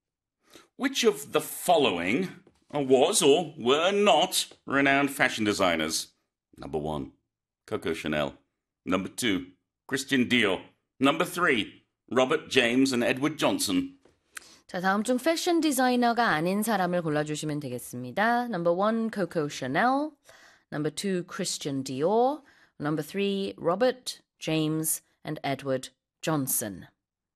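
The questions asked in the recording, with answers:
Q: Which of the following was or were not renowned fashion designers?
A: 3: Robert James and Edward Johnson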